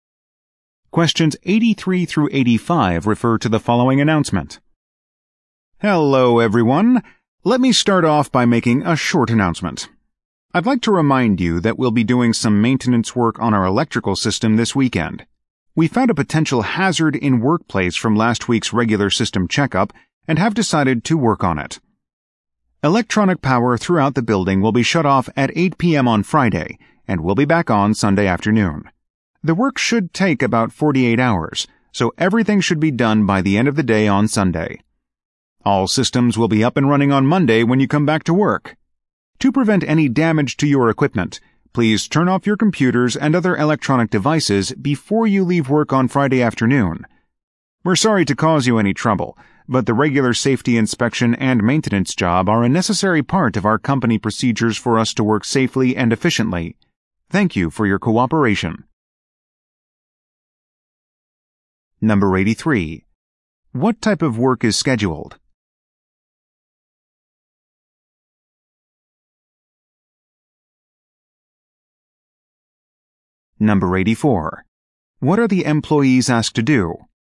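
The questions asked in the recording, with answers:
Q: What type of work is scheduled?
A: Maintenance on the electrical system

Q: What are the employees asked to do?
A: Turn off their computers and other electronic devices before leaving on Friday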